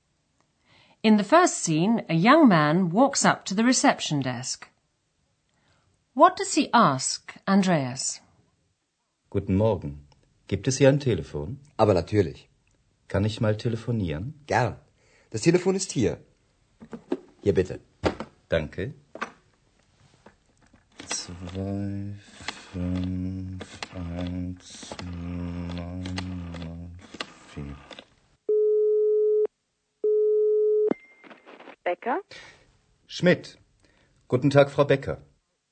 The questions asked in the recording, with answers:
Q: What does he ask, Andreas?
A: The young man asked if there was a telephone he could use.